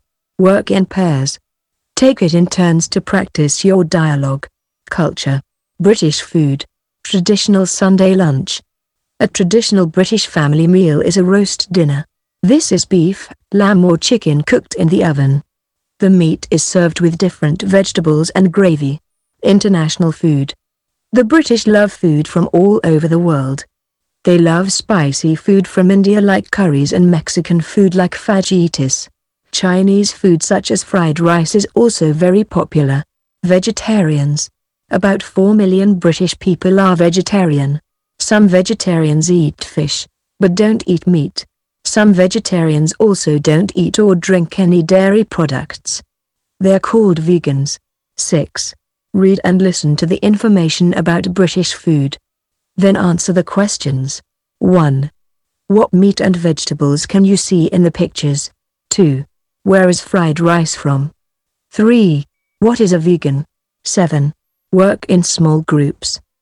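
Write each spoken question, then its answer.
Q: Where is fried rice from?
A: China

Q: What is a vegan?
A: A vegetarian who also doesn't eat or drink any dairy products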